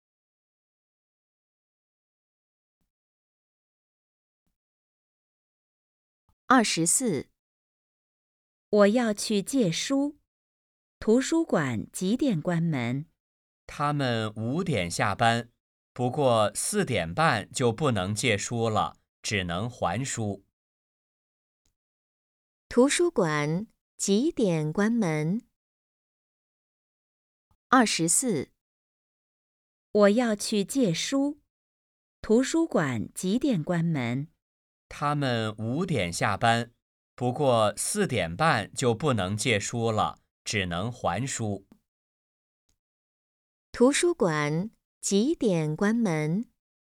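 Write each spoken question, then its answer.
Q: 图书馆几点关门?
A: 5点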